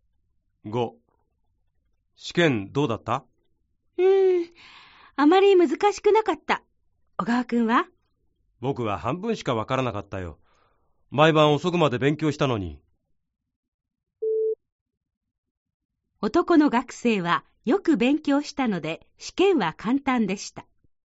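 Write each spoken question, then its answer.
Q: 男の学生はよく勉強したので試験は簡単でした。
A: ×(間違い)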